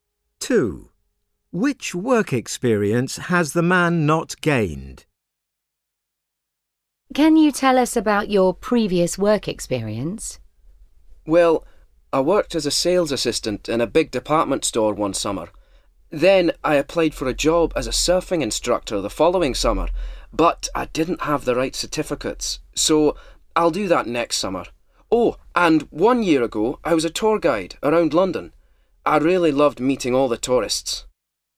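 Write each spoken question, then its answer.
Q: Which work experience has the man not gained?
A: surfing instructor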